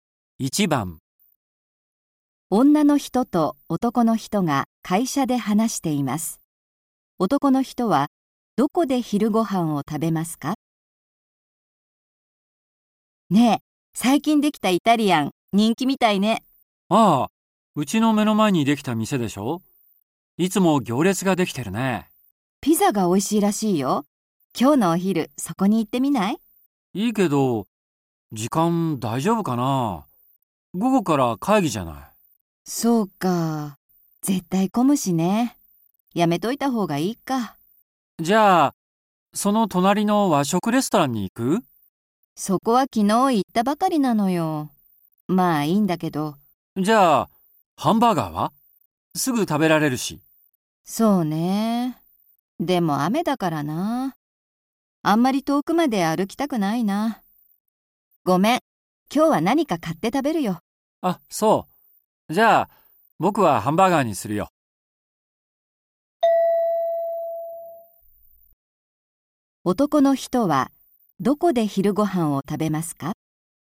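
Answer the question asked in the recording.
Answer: ハンバーガーの店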